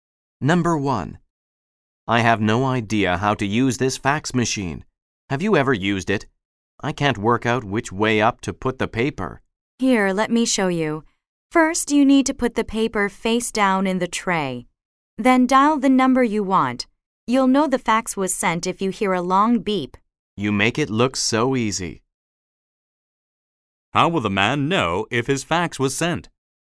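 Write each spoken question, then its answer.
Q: How will the man know if his fax was sent?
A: He will hear a long beep.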